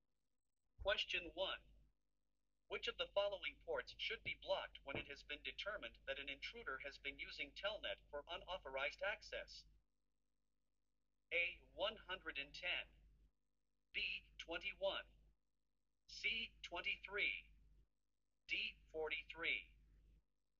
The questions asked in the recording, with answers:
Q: Which of the following ports should be blocked when it has been determined that an intruder has been using Telnet for unauthorized access?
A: The correct answer is C. Telnet uses port 23.